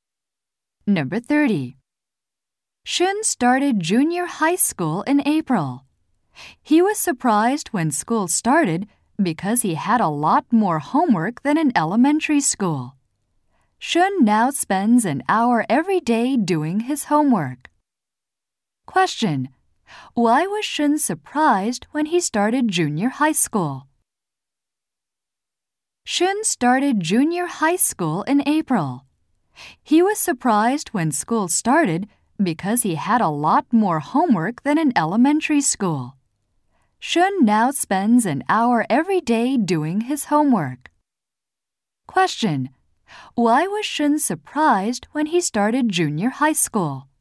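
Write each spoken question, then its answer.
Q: Why was Shun surprised when he started junior high school?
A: He had a lot more homework than in elementary school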